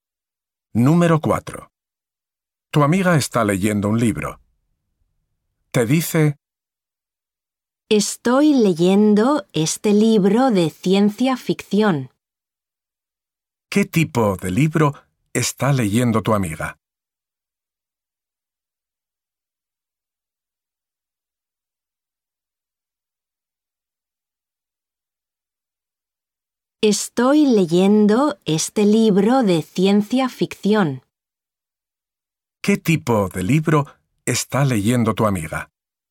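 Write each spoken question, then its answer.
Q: ¿Qué tipo de libro está leyendo tu amiga?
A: Un libro de ciencia ficción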